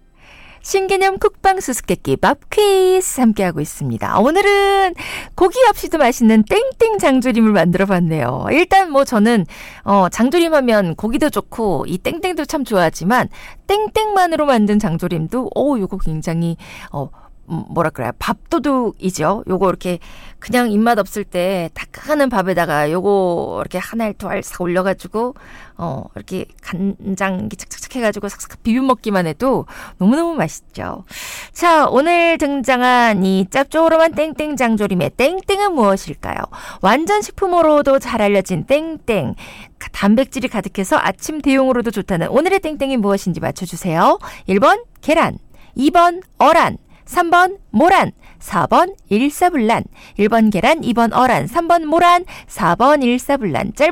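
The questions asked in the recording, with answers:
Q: 자, 오늘 등장한 이 짭조름한 땡땡 장조림의 땡땡은 무엇일까요?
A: 1: 계란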